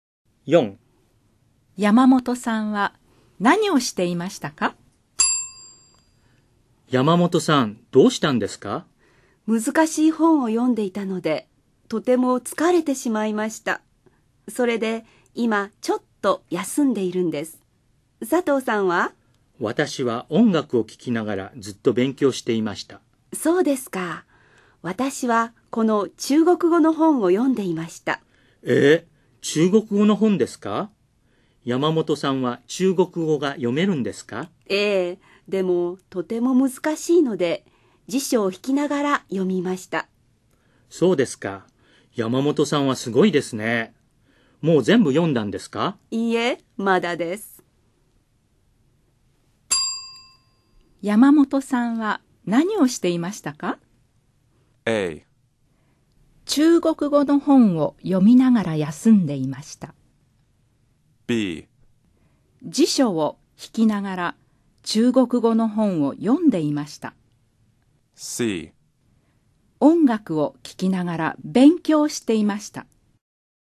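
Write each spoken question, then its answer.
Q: 山本さんは何をしていましたか?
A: B: 辞書を引きながら中国語の本を読んでいました。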